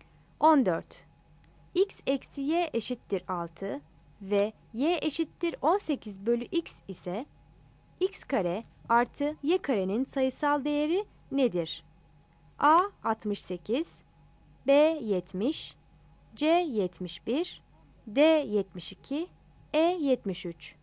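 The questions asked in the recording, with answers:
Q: X eksi Y eşittir 6 ve Y eşittir 18 bölü X ise X kare artı Y karenin sayısal değeri nedir?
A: D: 72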